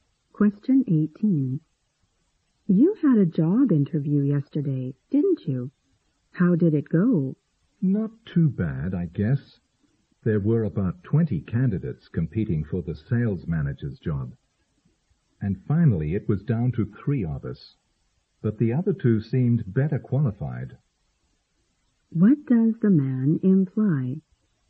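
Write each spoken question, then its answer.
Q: What does the man imply?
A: He probably won't get the job because the other two candidates seemed better qualified.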